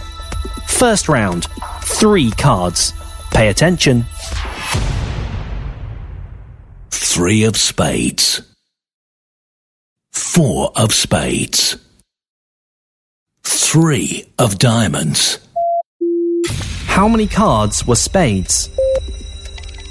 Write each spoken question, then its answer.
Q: How many cards were spades?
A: 2 is the answer.